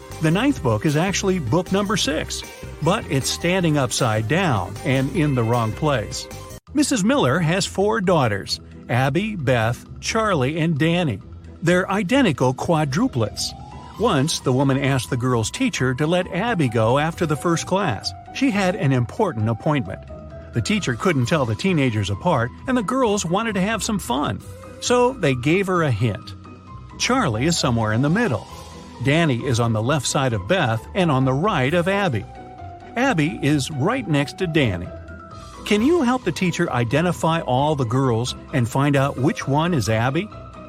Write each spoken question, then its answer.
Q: Can you help the teacher identify all the girls and find out which one is Abby?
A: It means that the right order is Abby, Danny, Charlie, and Beth.